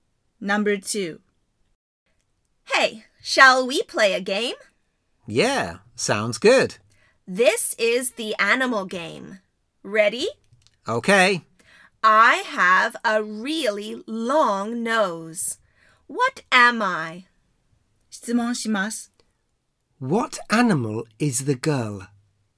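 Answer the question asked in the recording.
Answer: An elephant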